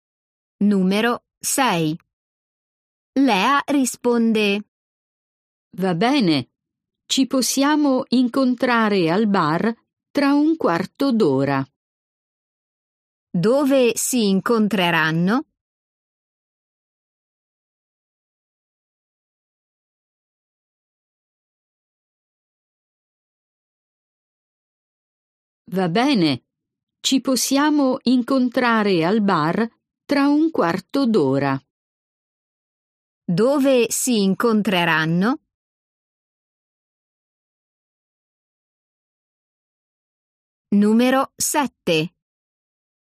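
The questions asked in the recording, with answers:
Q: Dove si incontreranno?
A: al bar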